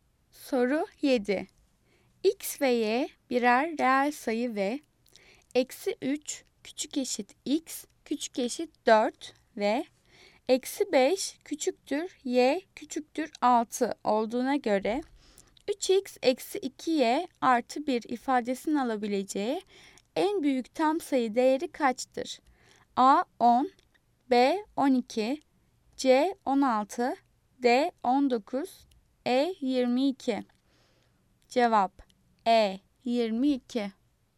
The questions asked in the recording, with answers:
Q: X ve Y birer reel sayı ve eksi 3 küçük eşit X küçük eşit 4 ve eksi 5 küçüktür Y küçüktür 6 olduğuna göre 3X eksi 2Y artı 1 ifadesini alabileceği en büyük tam sayı değeri kaçtır?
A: Cevap E 22.